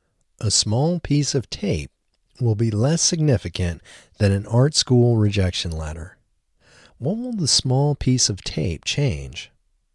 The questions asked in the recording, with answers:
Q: What will the small piece of tape change?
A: The small piece of tape will change history.